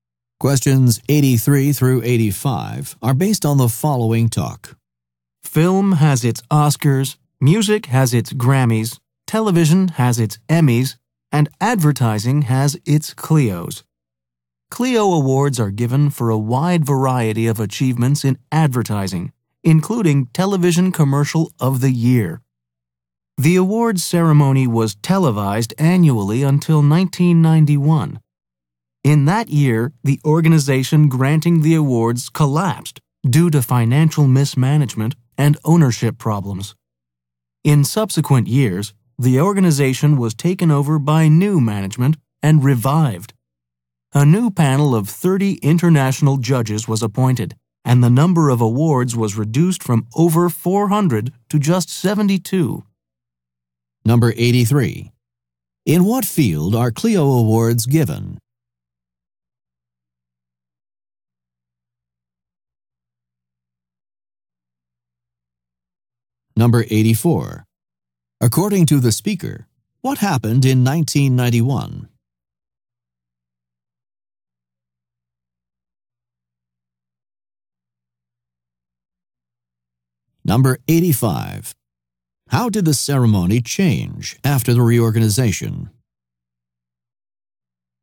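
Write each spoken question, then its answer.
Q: In what field are Clio Awards given?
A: Advertising

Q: According to the speaker, what happened in 1991?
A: The organization collapsed

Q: How did the ceremony change after the reorganization?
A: Fewer awards (72) and a new panel of 30 international judges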